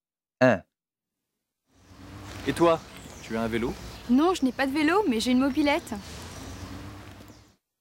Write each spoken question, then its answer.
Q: Et toi, tu as un vélo?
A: 1A, non.